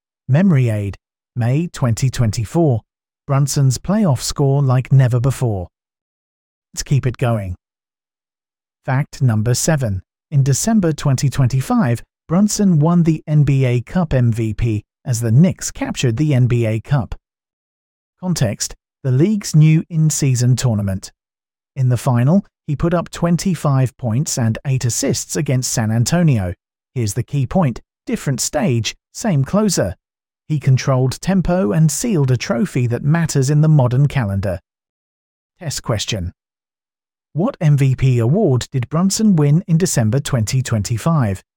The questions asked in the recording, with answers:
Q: What MVP award did Brunson win in December 2025?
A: NBA Cup MVP.